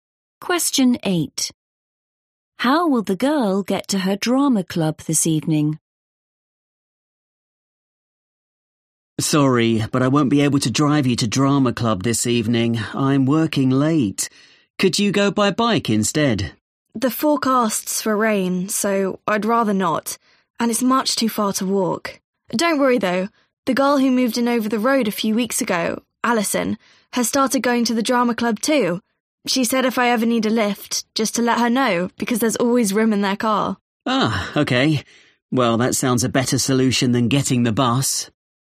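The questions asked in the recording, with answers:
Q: How will the girl get to her drama club this evening?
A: She'll get a lift in Alison's car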